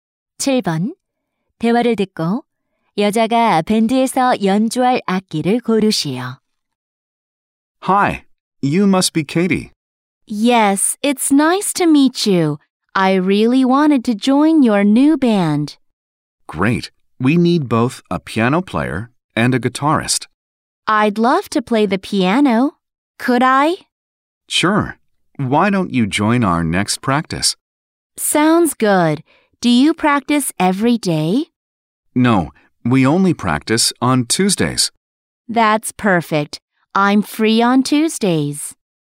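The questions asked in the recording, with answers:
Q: 대화를 듣고 여자가 밴드에서 연주할 악기를 고르시오.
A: 피아노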